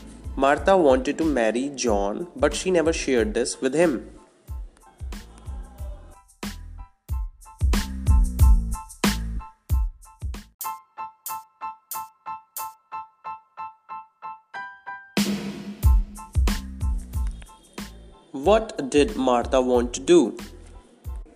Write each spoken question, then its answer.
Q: What did Martha want to do?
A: Martha wanted to marry John.